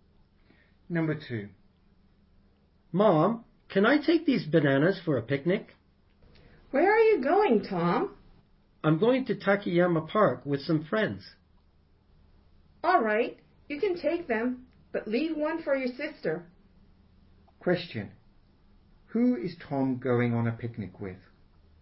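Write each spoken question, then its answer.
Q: Who is Tom going on a picnic with?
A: Some friends.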